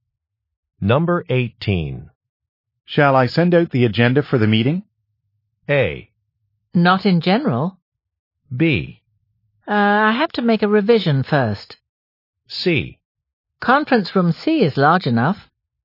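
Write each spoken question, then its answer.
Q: Shall I send out the agenda for the meeting?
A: B: I have to make a revision first.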